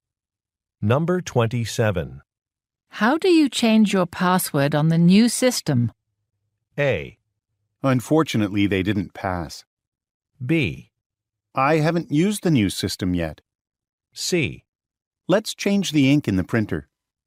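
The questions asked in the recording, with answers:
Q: How do you change your password on the new system?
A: B: I haven't used the new system yet.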